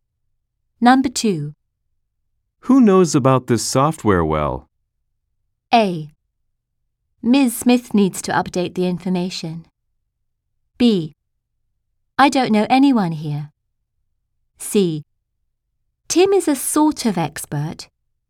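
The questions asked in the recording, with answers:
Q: Who knows about this software well?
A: C: Tim is a sort of expert.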